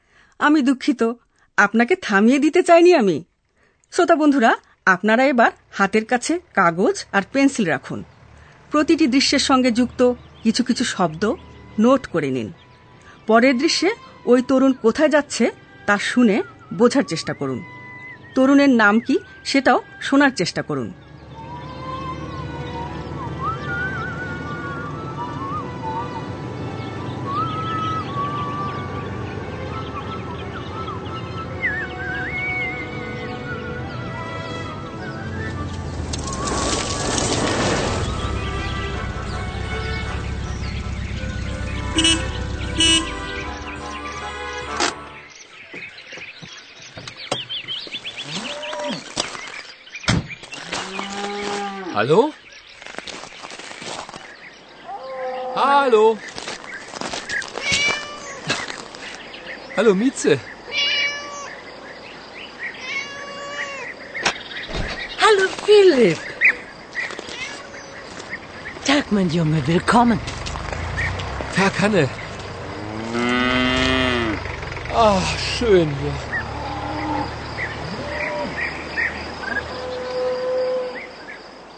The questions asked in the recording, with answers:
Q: তরুণের নাম কি সেটাও শোনার চেষ্টা করুন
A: তরুণের নাম Philip